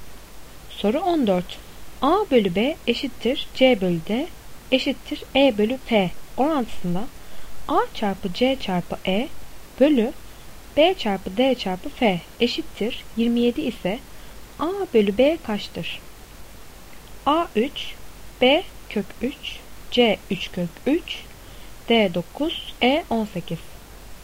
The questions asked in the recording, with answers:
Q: A bölü B eşittir C bölü D eşittir E bölü F orantısında A çarpı C çarpı E bölü B çarpı D çarpı F eşittir 27 ise A bölü B kaçtır?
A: Doğru cevap A 3.